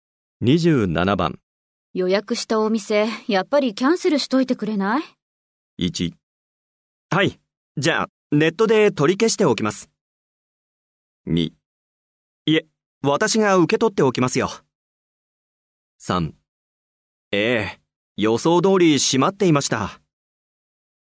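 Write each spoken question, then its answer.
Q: 予約したお店、やっぱりキャンセルしといてくれない?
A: 1: はい、じゃあネットで取り消しておきます。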